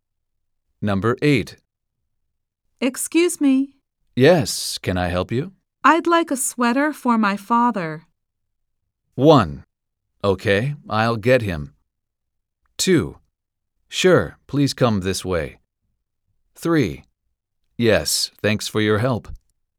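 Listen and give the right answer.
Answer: 2: Sure, please come this way.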